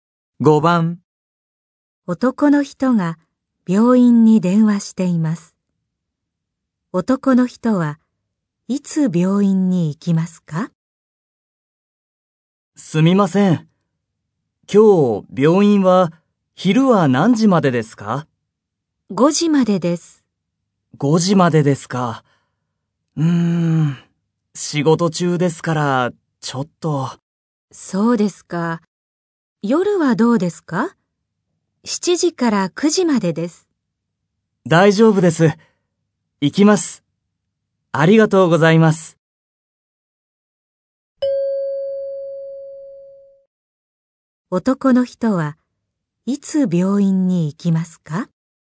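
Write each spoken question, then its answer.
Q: 男の人はいつ病院に行きますか?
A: 今日の夜(7時から9時の間)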